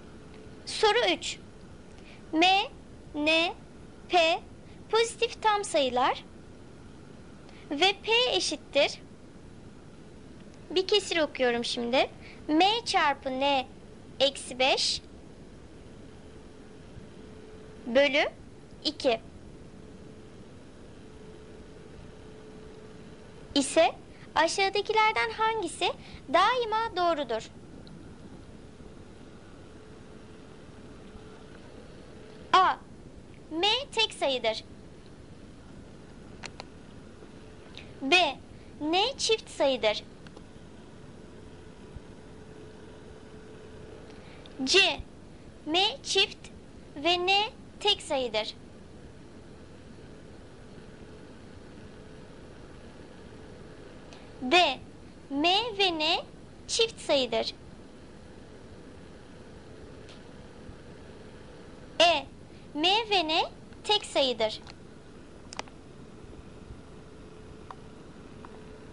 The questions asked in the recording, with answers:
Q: ise aşağıdakilerden hangisi daima doğrudur?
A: Doğru cevap E. M ve N tek sayıdır.